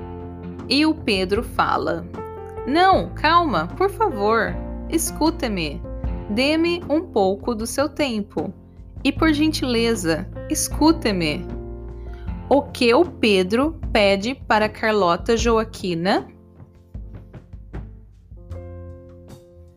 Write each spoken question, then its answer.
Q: O que o Pedro pede para Carlota Joaquina?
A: Ele pede para ela ficar calma e para escutá-lo ele pede um pouco do tempo da Carlota Joaquina.